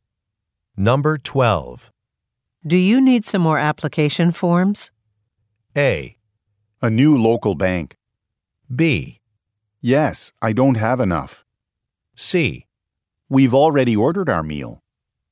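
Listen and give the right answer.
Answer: B: Yes, I don't have enough.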